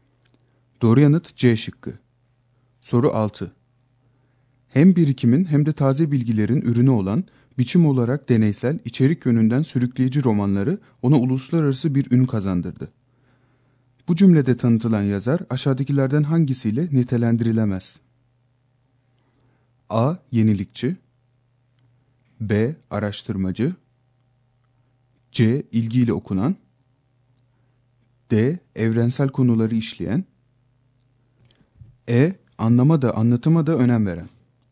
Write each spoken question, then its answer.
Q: Bu cümlede tanıtılan yazar aşağıdakilerden hangisiyle nitelendirilemez?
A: Doğru yanıt D şıkkı.